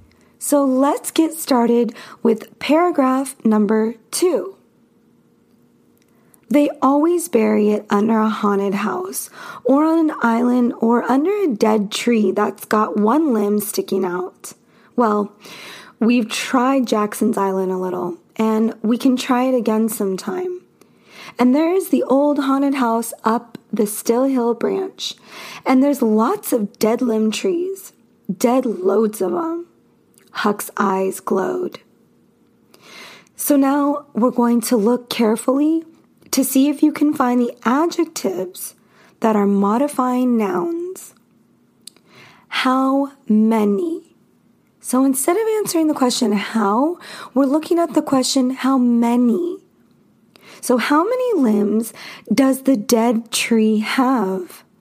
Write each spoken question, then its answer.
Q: So how many limbs does the dead tree have?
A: And the answer is one limb.